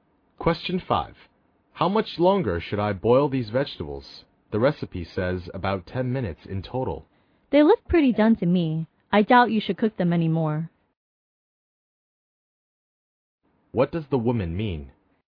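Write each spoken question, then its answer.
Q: What does the woman mean?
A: The vegetables are done and shouldn't be boiled any longer.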